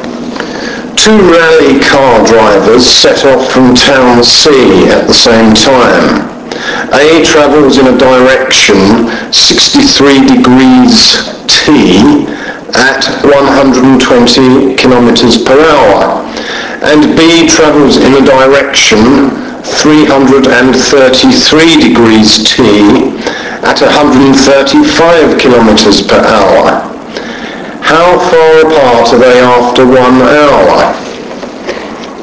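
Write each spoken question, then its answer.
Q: How far apart are they after 1 hour?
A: about 180.6 km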